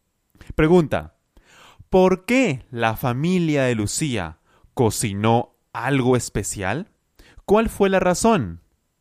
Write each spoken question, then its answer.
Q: ¿Por qué la familia de Lucía cocinó algo especial?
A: por el Día de la Independencia.